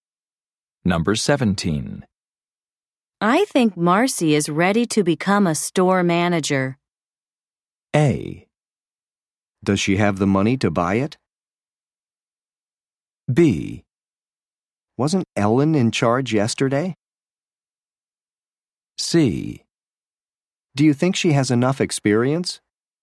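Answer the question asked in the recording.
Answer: C: Do you think she has enough experience?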